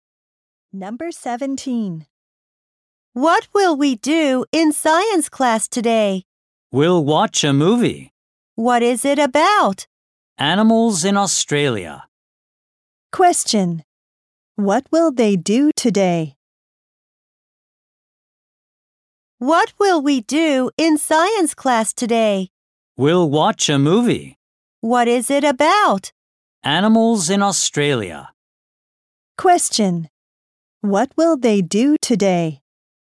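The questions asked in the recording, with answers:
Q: What will they do today?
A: Watch a movie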